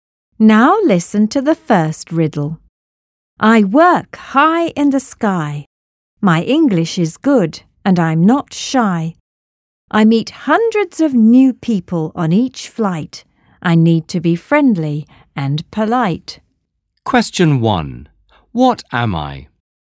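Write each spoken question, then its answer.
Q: What am I?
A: a flight attendant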